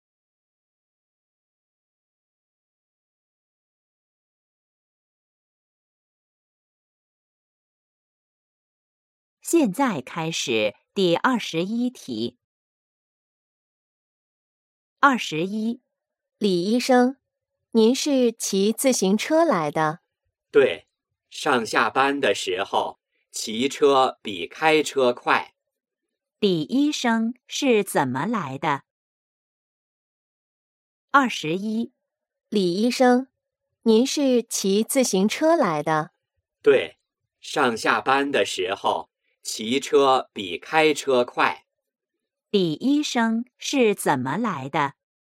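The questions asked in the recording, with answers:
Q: 李医生是怎么来的?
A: 骑自行车来的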